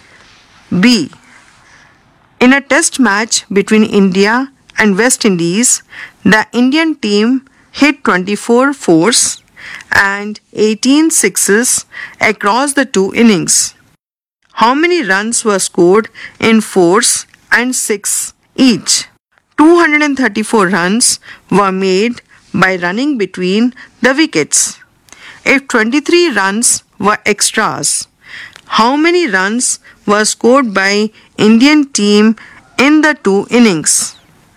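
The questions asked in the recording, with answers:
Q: How many runs were scored in fours and six each?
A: 96 runs in fours and 108 runs in sixes

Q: If 23 runs were extras, how many runs were scored by Indian team in the two innings?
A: 461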